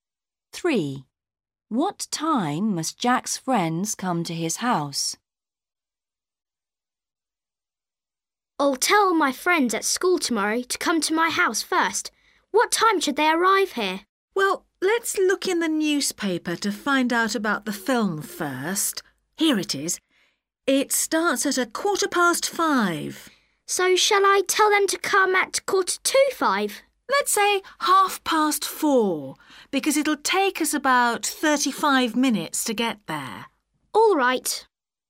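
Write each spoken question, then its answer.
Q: What time must Jack's friends come to his house?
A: 4:30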